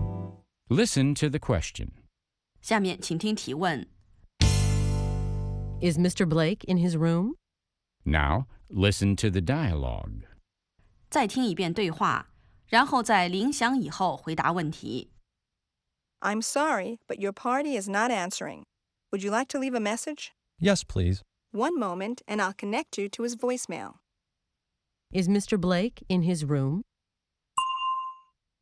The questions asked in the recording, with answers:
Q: Is Mr. Blake in his room?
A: No, he isn't.